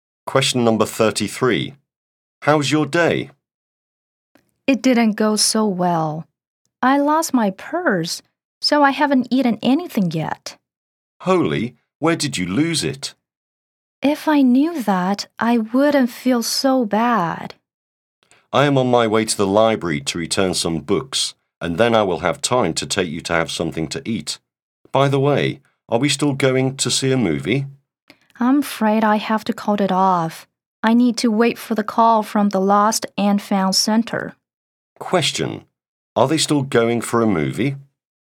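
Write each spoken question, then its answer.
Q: Are they still going for a movie?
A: No, the speaker calls it off to wait for a call from the Lost and Found Center.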